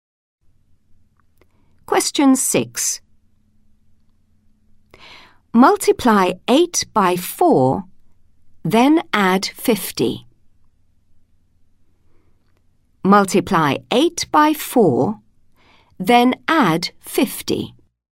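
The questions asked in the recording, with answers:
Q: Multiply 8 by 4, then add 50.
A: 82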